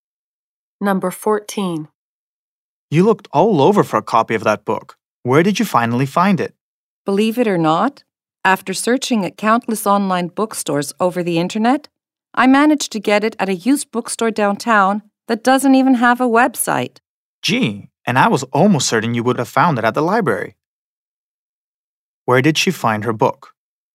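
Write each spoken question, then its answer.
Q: Where did she find her book?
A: At a used bookstore downtown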